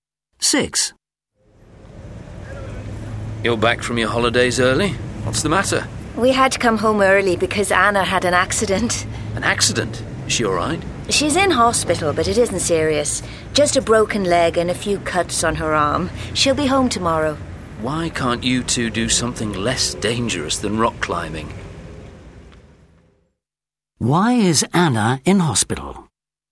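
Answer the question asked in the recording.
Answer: She broke her leg rock climbing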